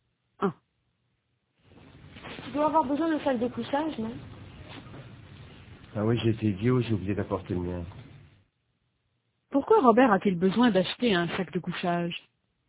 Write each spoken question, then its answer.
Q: Pourquoi Robert a-t-il besoin d'acheter un sac de couchage?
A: Parce qu'il n'a pas apporté le sien.